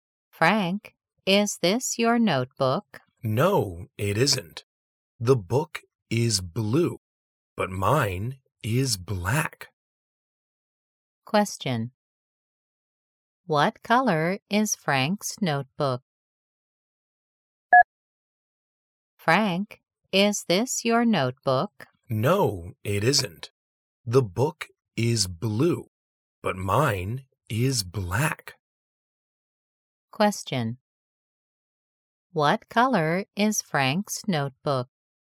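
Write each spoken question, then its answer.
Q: What color is Frank's notebook?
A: Black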